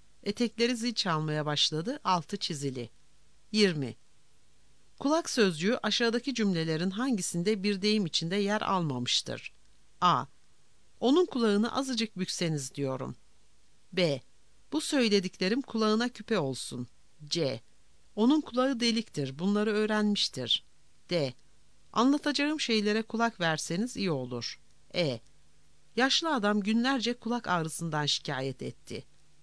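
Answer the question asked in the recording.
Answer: E: Yaşlı adam günlerce kulak ağrısından şikayet etti.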